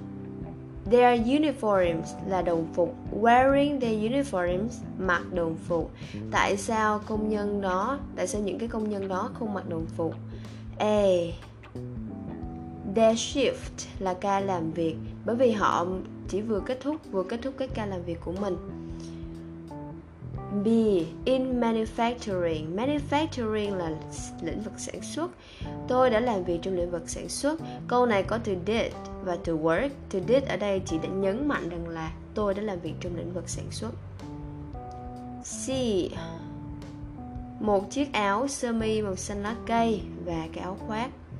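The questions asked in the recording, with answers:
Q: Tại sao công nhân đó, tại sao những cái công nhân đó không mặc đồng phục?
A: A: bởi vì họ chỉ vừa kết thúc cái ca làm việc của mình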